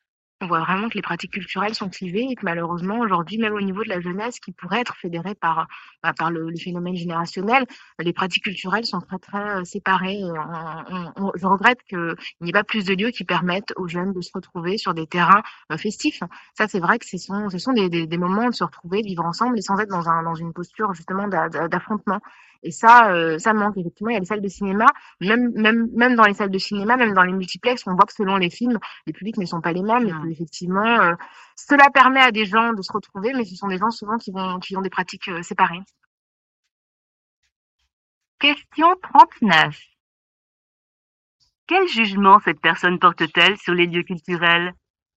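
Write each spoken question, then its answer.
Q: Quel jugement cette personne porte-t-elle sur les lieux culturels ?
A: Il n'y a pas assez de lieux où les jeunes se retrouvent, et les publics restent séparés.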